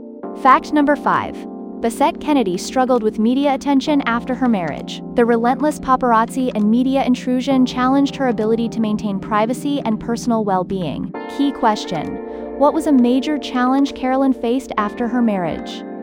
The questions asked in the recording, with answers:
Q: what was a major challenge Carolyn faced after her marriage?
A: media attention.